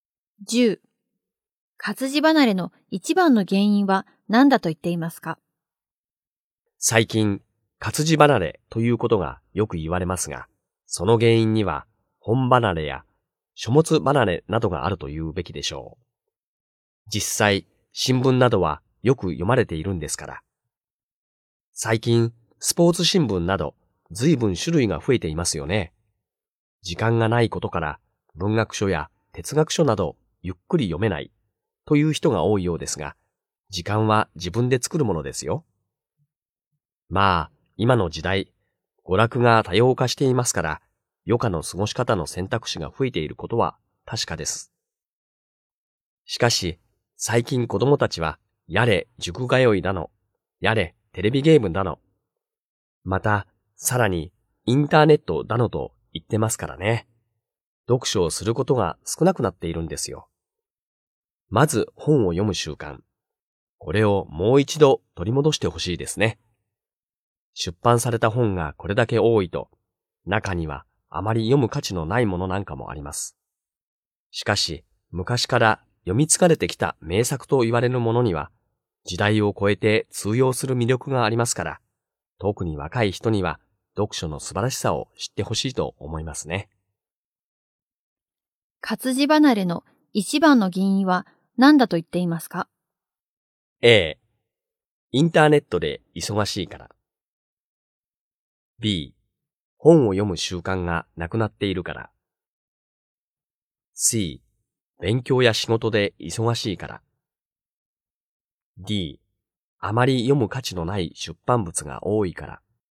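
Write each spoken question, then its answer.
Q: 活字離れの一番の原因は何だと言っていますか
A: B: 本を読む習慣がなくなっているから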